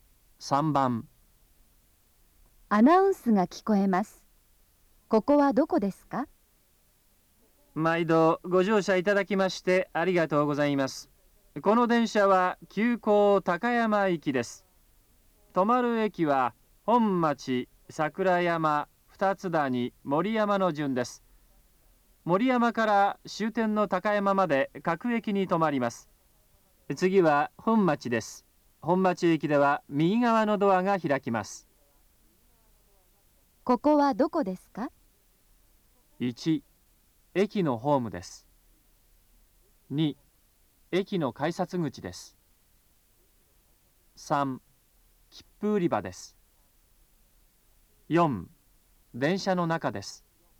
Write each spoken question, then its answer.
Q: ここはどこですか?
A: 3番、4